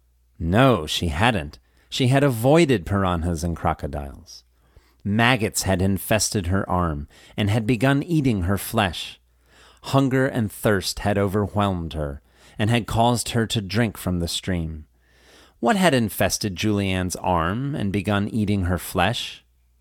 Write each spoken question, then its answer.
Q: What had infested Julianne's arm and begun eating her flesh?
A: Maggots had infested her arm and begun eating her flesh.